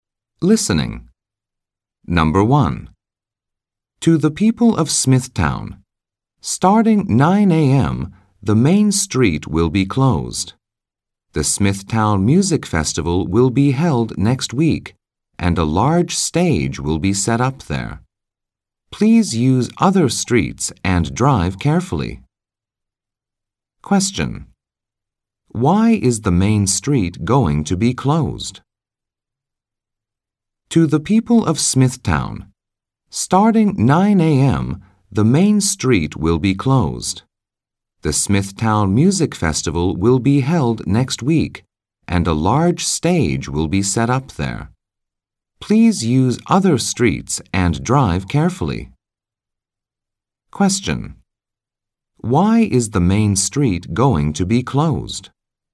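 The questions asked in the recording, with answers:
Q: Why is the main street going to be closed?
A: A large stage will be set up there for the Smithtown Music Festival.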